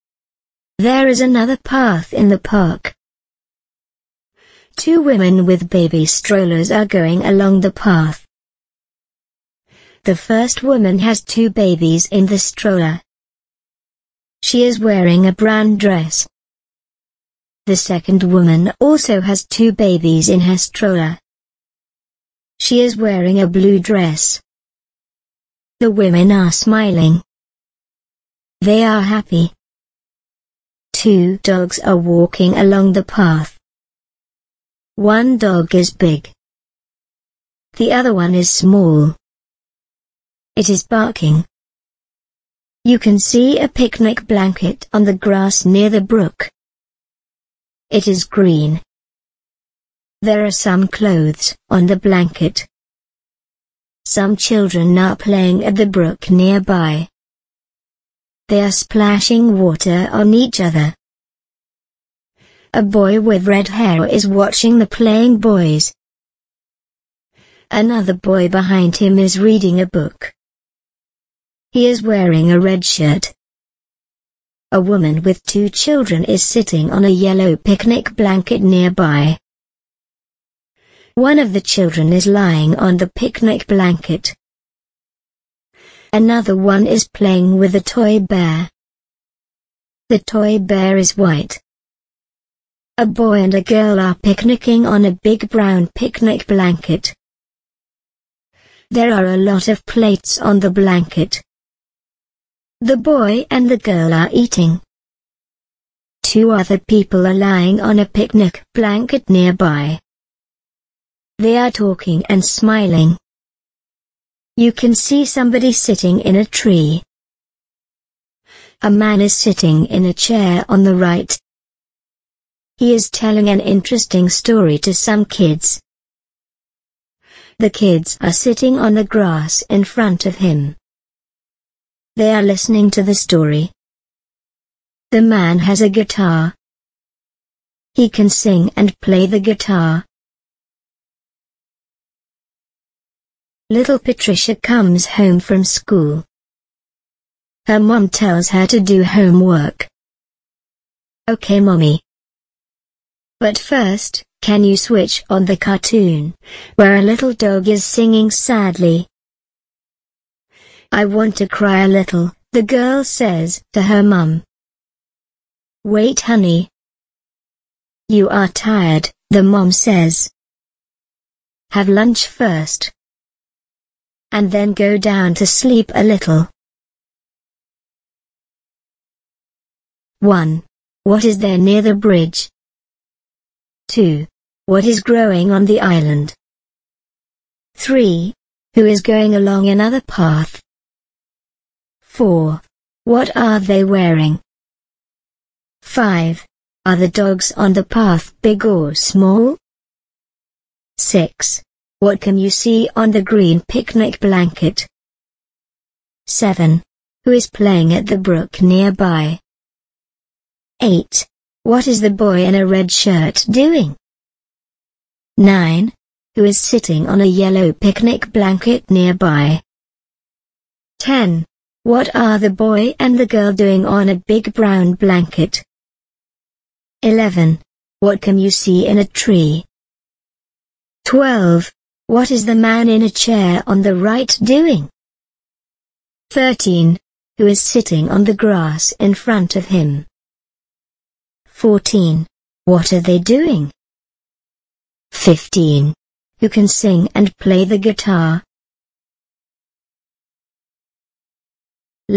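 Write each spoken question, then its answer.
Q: Who is going along another path?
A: Two women with baby strollers

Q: What are they wearing?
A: A brown dress and a blue dress

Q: Are the dogs on the path big or small?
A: One is big, the other is small

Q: What can you see on the green picnic blanket?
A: Some clothes

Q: Who is playing at the brook nearby?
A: Some children

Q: What is the boy in a red shirt doing?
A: Reading a book

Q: Who is sitting on a yellow picnic blanket nearby?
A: A woman with two children

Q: What are the boy and the girl doing on a big brown blanket?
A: Picnicking, eating

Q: What can you see in a tree?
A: Somebody sitting in it

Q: What is the man in a chair on the right doing?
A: Telling an interesting story to some kids

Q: Who is sitting on the grass in front of him?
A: The kids

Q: What are they doing?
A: Listening to the story

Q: Who can sing and play the guitar?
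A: The man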